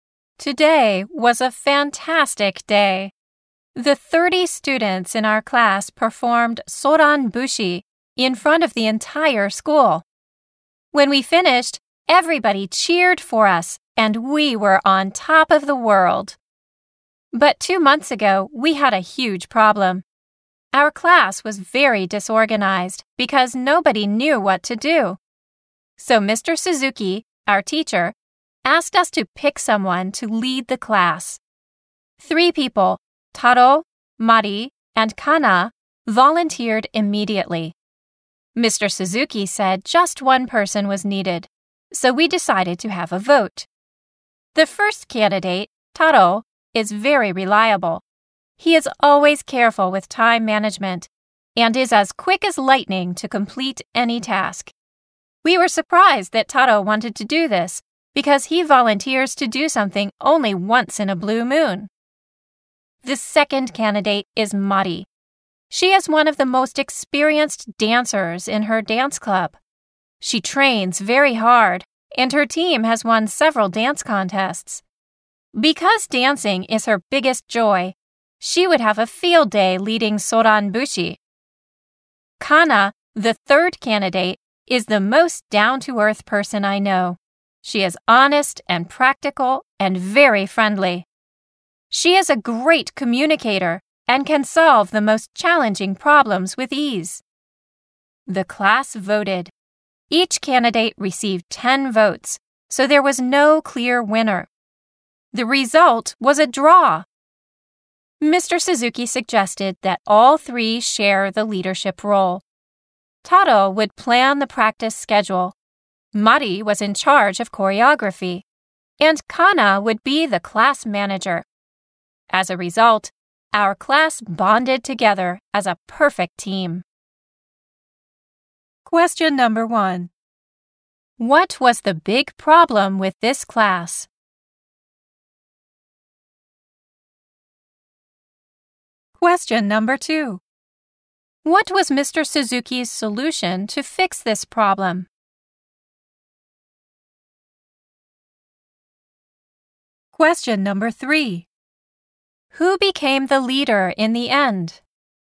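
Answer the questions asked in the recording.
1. The class was very disorganized because nobody knew what to do.
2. He asked the class to pick someone to lead it, and after the tied vote he had all three share the leadership role.
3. Taro, Mari and Kana all shared the leadership.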